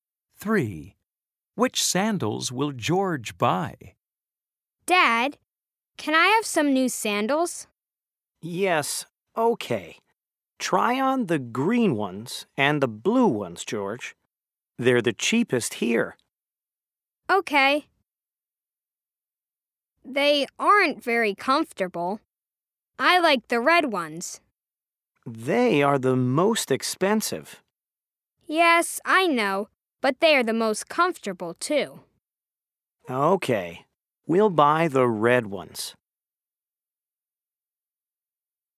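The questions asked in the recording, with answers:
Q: Which sandals will George buy?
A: The red ones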